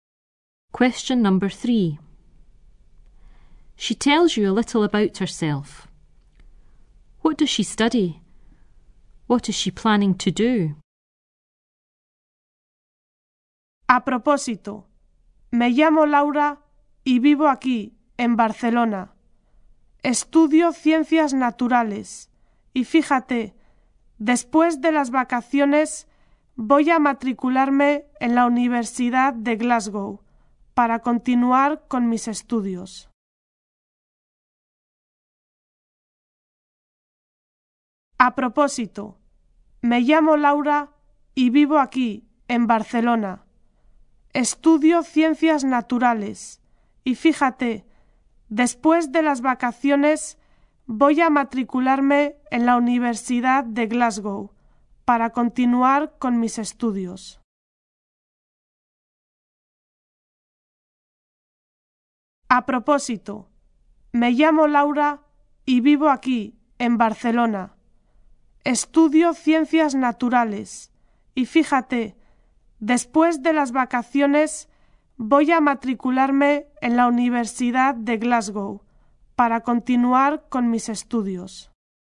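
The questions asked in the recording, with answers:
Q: What does she study? What is she planning to do?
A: Natural sciences; enrol at Glasgow University after the holidays to continue her studies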